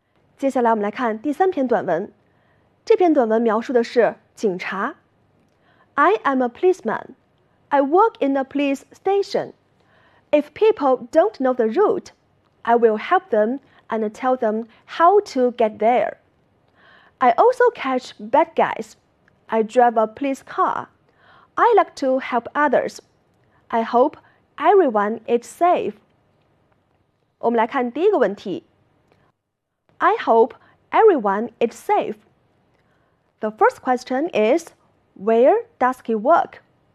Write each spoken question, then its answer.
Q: where does he work?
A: He works in a police station.